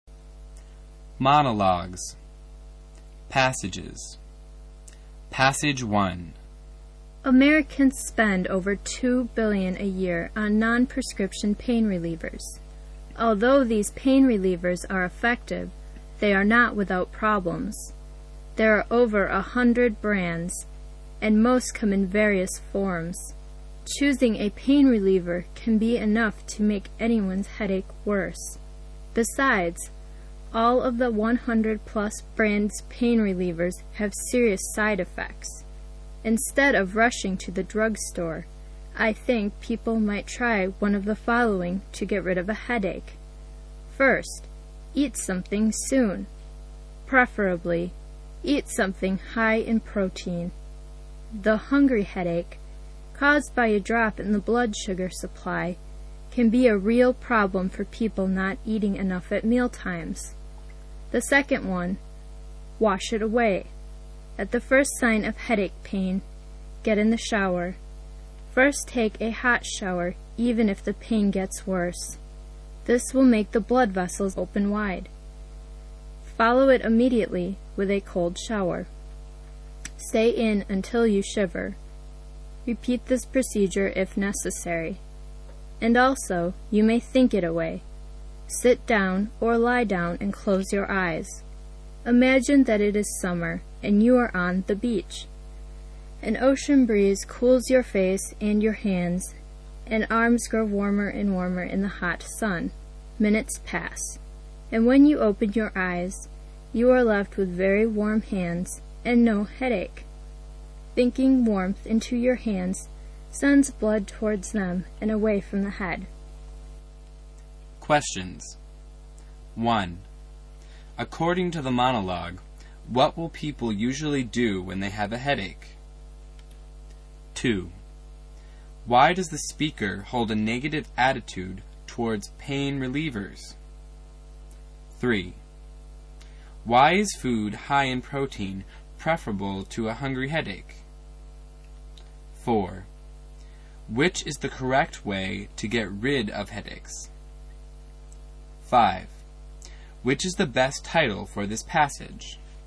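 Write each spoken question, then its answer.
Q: According to the monologue, what will people usually do when they have a headache?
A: Rush to the drugstore for non-prescription pain relievers

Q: Why does the speaker hold a negative attitude towards pain relievers?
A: They all have serious side effects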